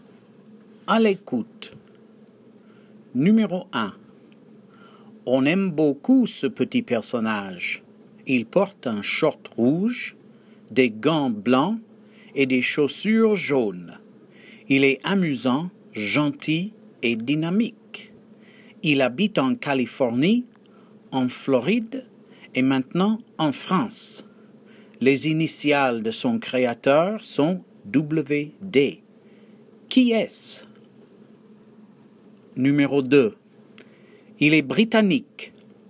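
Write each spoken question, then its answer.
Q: Qui est-ce?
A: Mickey Mouse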